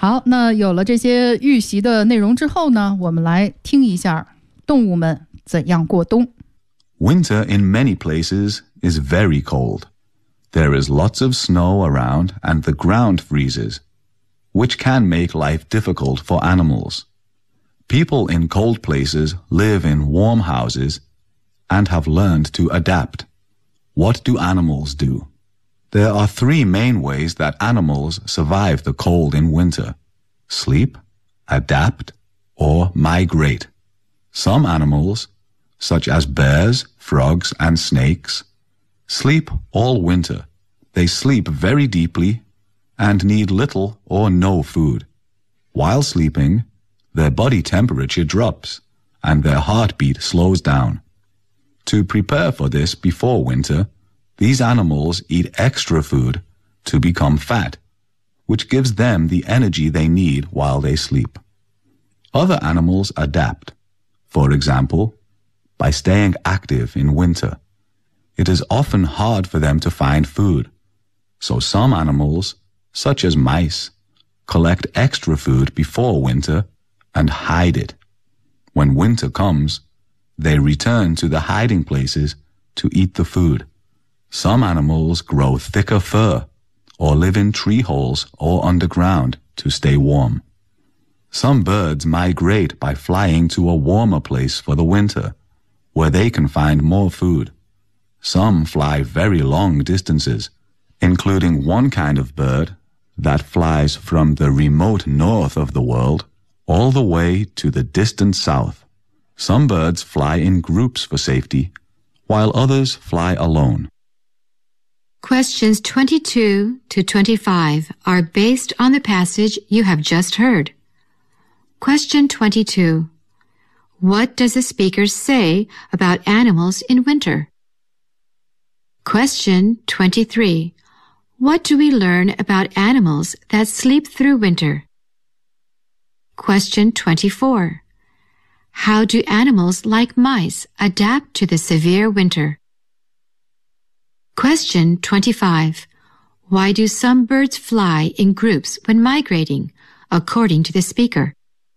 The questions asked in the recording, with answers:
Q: What does the speaker say about animals in winter?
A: The animals adapt in different ways, in order to avoid the coldness in winter.

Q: What do we learn about animals that sleep through winter?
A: they seldom eat any food at all.

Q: How do animals like mice adapt to the severe winter?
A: Animals like mice may collect extra food and hide the food so that in winter time they return to the place and eat the food there.

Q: Why do some birds fly in groups when migrating, according to the speaker?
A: That is for safety reasons that some animals may migrate in groups.